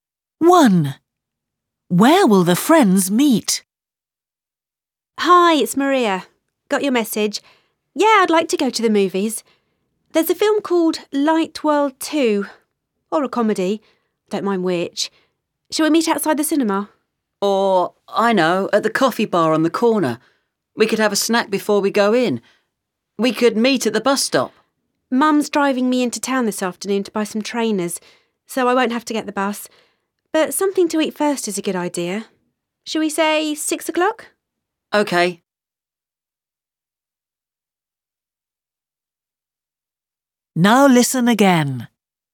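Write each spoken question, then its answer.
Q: Where will the friends meet?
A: At the coffee bar on the corner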